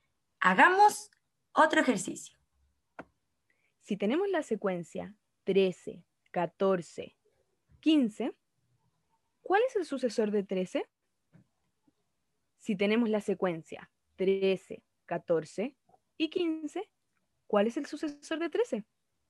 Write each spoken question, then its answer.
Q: ¿cuál es el sucesor de 13?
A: el sucesor del número 13 sería el número 14